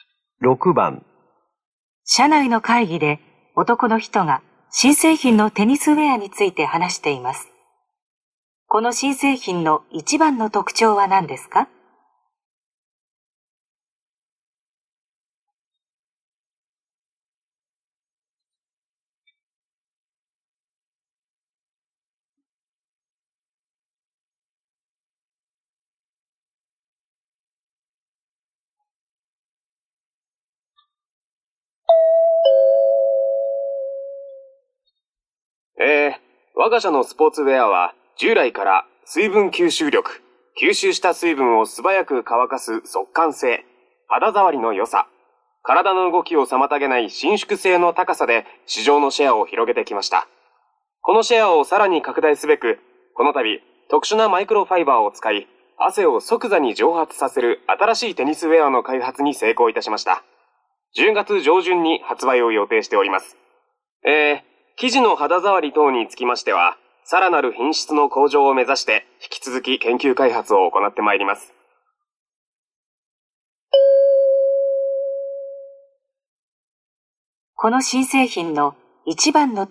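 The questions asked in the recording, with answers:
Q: この新製品の一番の特徴は何ですか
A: 汗を即座に蒸発させること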